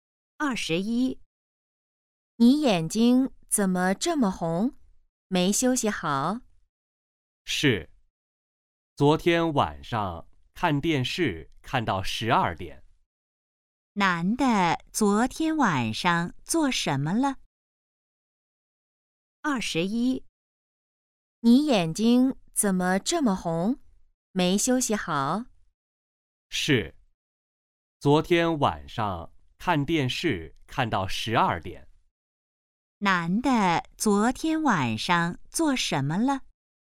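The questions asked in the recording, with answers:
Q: 男的昨天晚上做什么了?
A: 看电视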